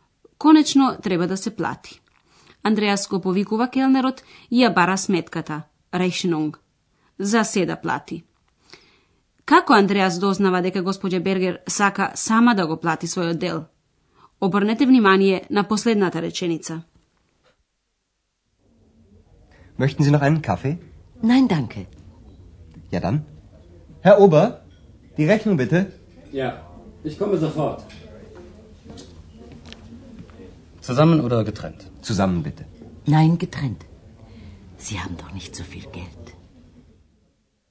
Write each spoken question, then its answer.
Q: Како Андреас дознава дека господја Бергер сака сама да го плати својот дел?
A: Господја Бергер на тоа одговара дека сака самата да плати, Не, одделно.